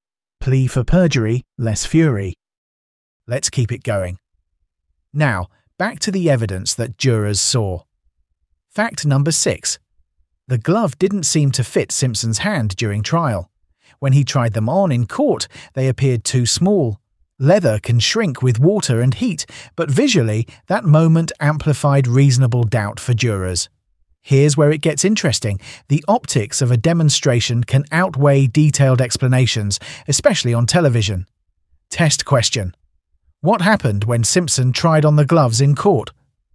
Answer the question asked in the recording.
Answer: Correct answer. They appeared too small.